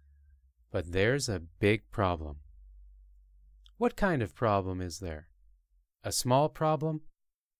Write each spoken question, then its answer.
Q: What kind of problem is there?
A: No, there's a big problem.